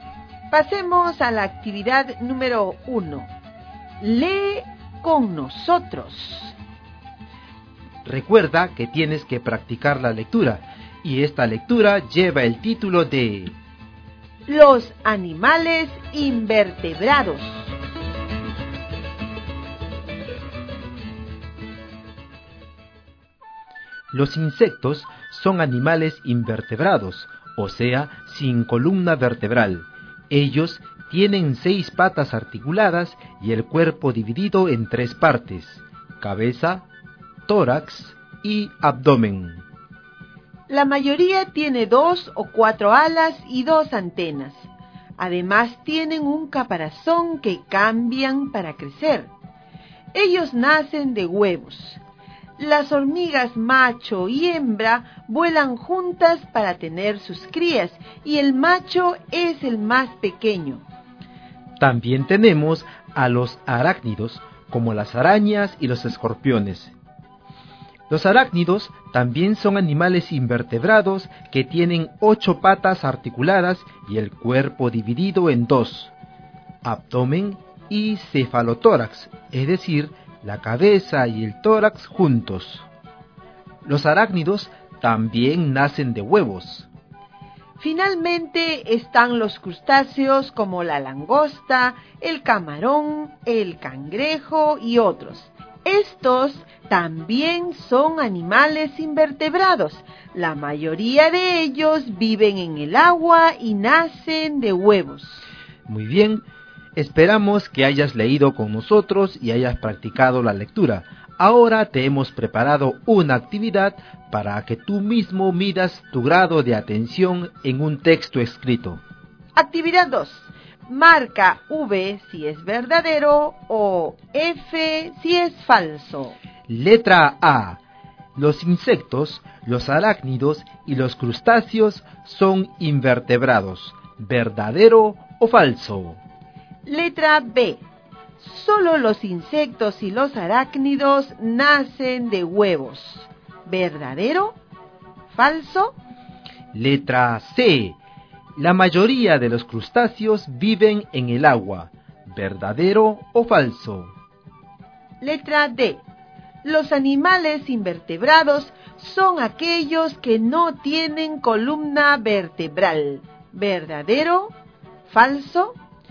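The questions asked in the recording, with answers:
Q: Letra A. Los insectos, los arácnidos y los crustáceos son invertebrados.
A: Verdadero

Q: Letra B. Solo los insectos y los arácnidos nacen de huevos.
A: Falso

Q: Letra C. La mayoría de los crustáceos viven en el agua.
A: Verdadero

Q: Letra D. Los animales invertebrados son aquellos que no tienen columna vertebral.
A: Verdadero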